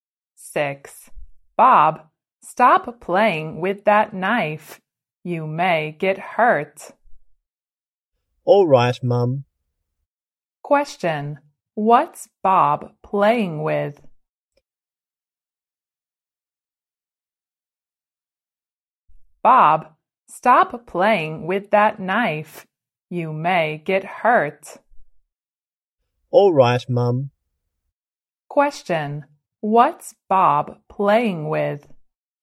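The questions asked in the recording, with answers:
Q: What's Bob playing with?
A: A knife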